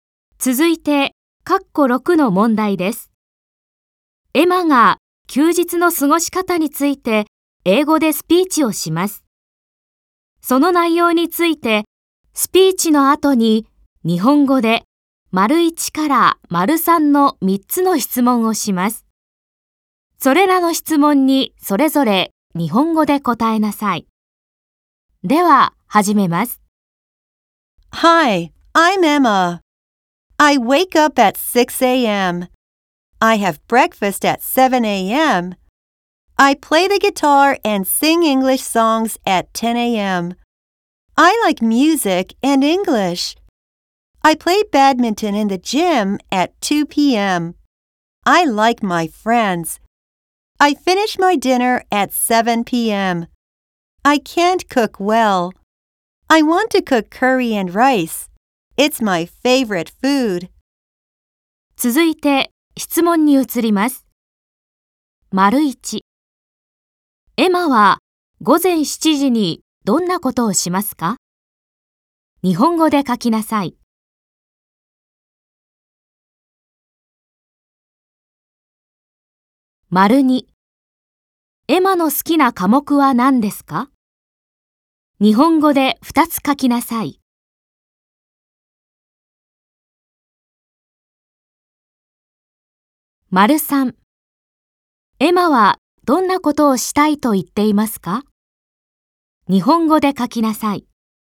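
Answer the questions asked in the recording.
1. 朝食を食べる
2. 音楽と英語
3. カレーライスを作りたい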